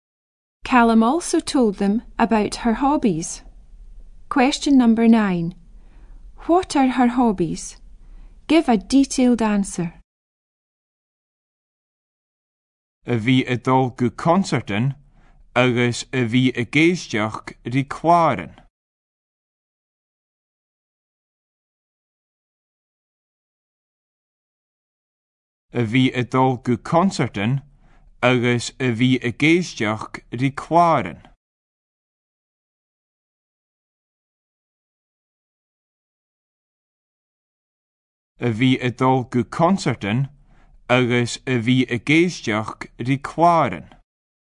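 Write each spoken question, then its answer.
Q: What are her hobbies?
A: Going to concerts and listening to records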